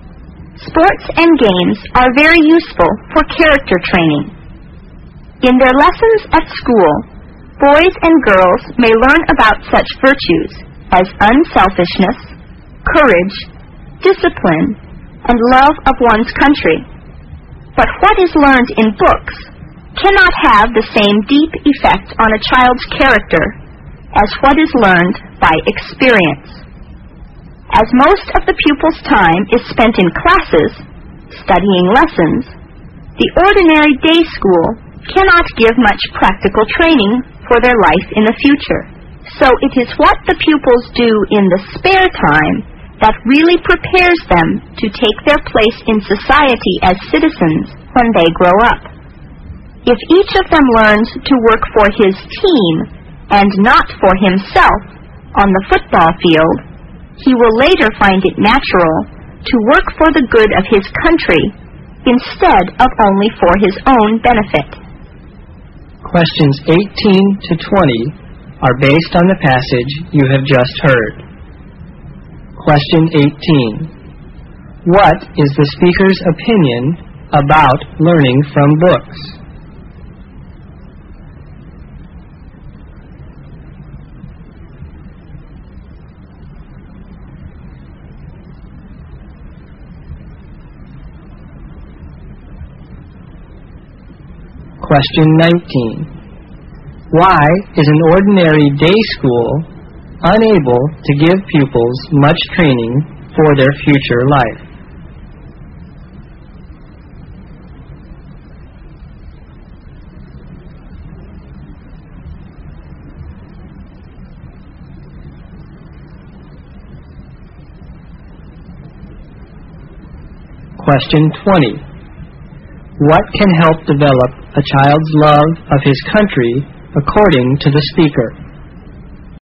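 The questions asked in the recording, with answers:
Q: What is the speaker's opinion about learning from books?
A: It cannot affect a child's character as deeply as learning by experience.

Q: Why is an ordinary day school unable to give pupils much training for their future life?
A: Because most of the pupils' time is spent in classes studying lessons.

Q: What can help develop a child's love of his country according to the speaker?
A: Learning to work for his team, not for himself, on the football field.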